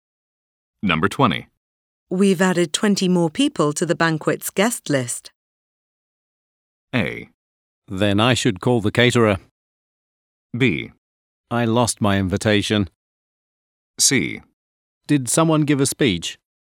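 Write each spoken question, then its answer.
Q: We've added 20 more people to the banquet's guest list.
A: A: Then I should call the caterer.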